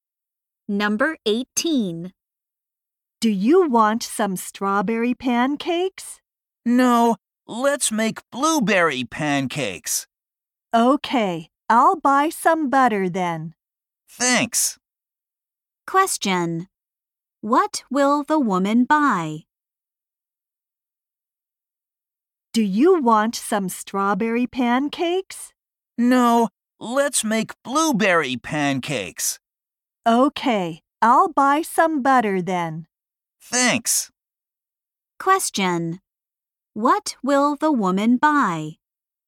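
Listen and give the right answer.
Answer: Butter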